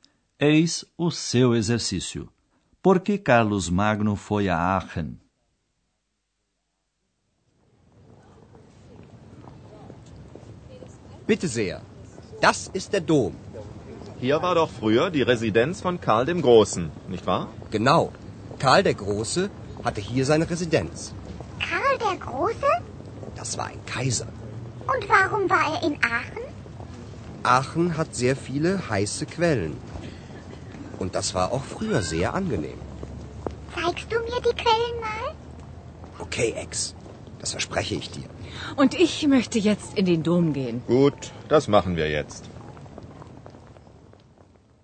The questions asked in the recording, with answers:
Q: Por que Carlos Magno foi a Aachen?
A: Carlos Magno foi a Aachen porque achava muito agradáveis as águas termais.